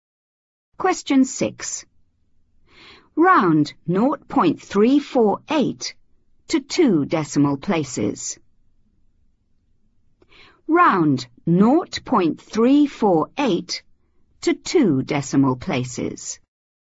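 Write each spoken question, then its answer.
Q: Round 0.348 to 2 decimal places.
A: 0.35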